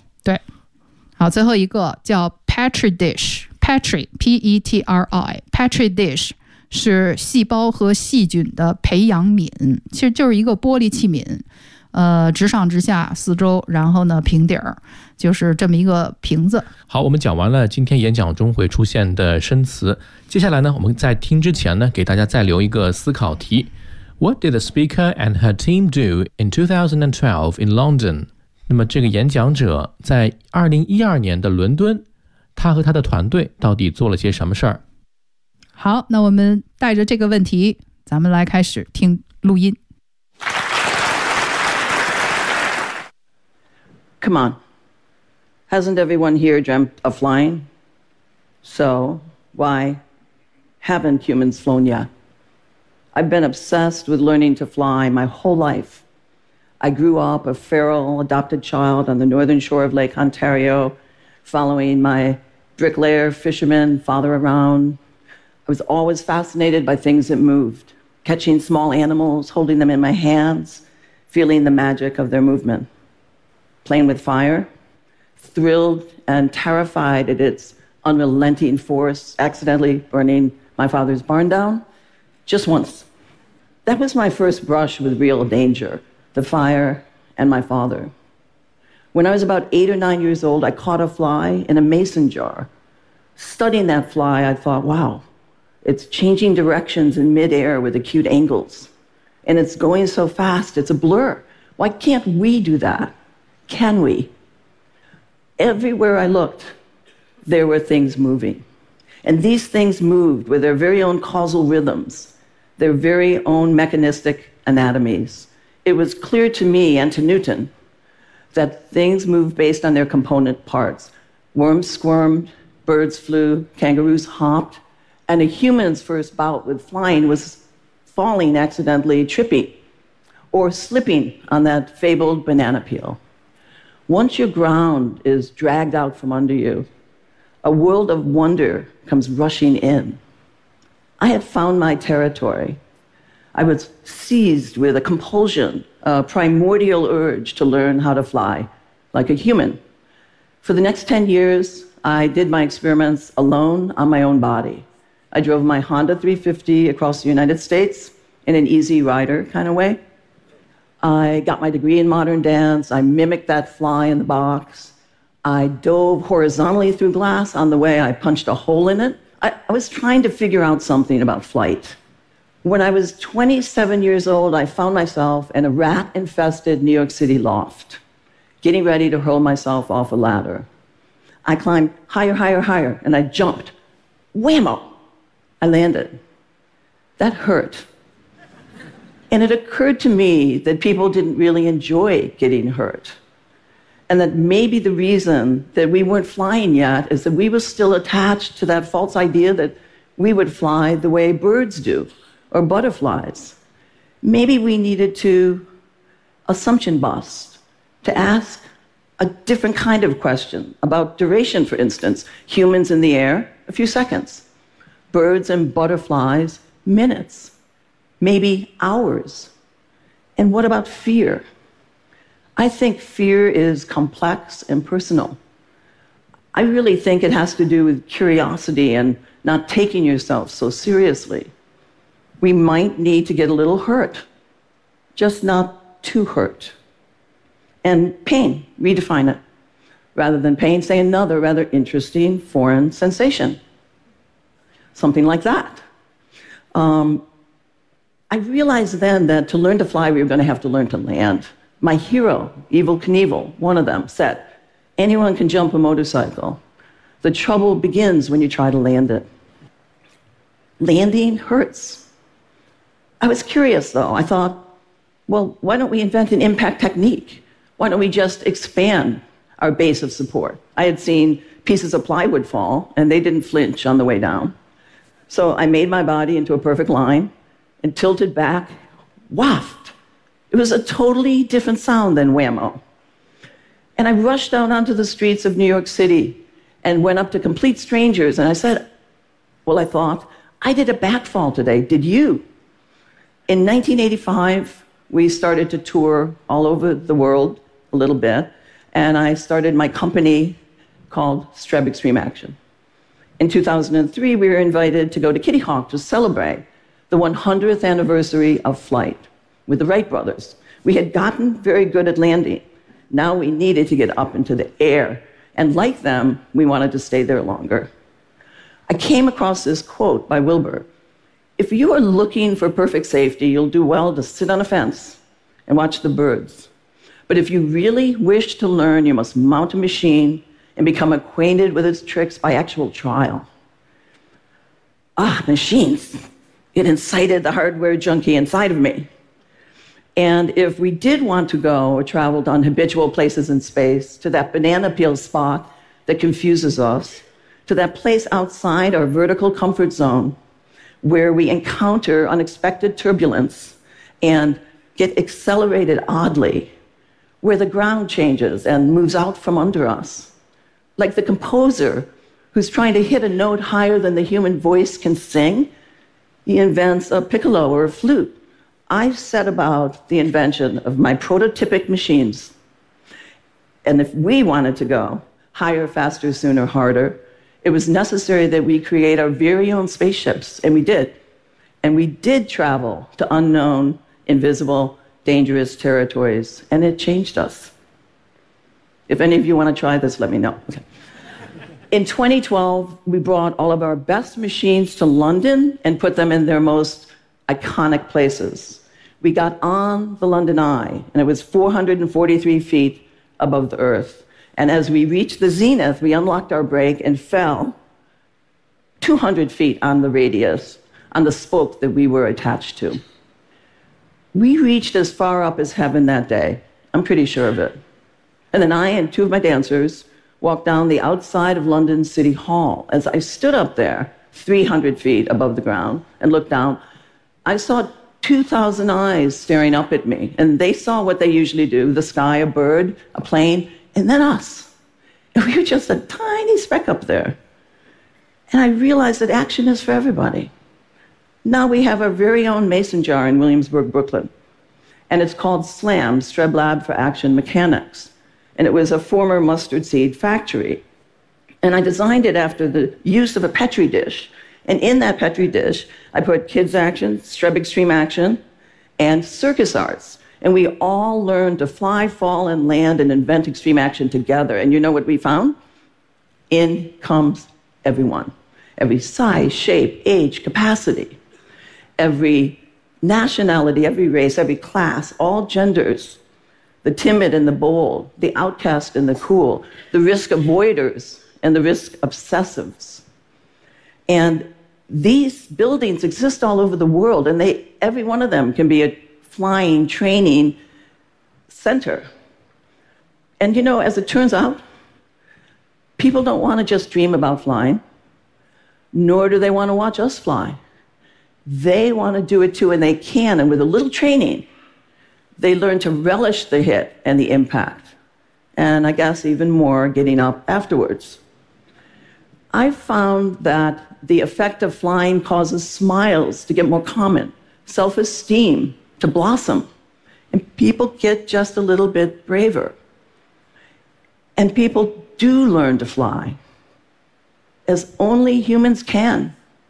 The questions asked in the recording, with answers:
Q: What did the speaker and her team do in 2012 in London?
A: In 2012, we brought all of our best machines to London and put them in their most iconic places.